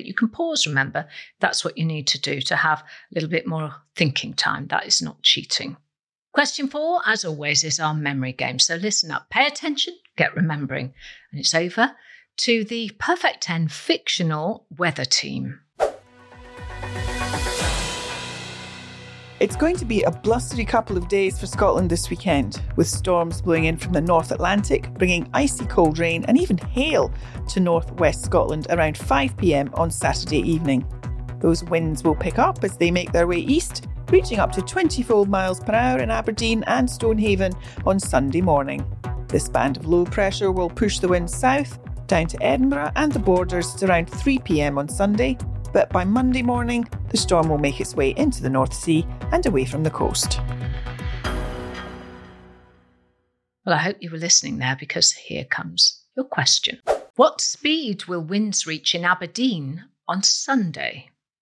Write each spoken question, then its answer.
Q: What speed will winds reach in Aberdeen on Sunday?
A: The answer was 24 miles an hour.